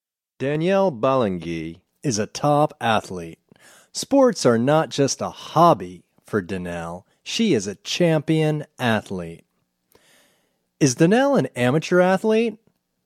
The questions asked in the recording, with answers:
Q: Is Danielle an amateur athlete?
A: No, Danielle isn't an amateur athlete.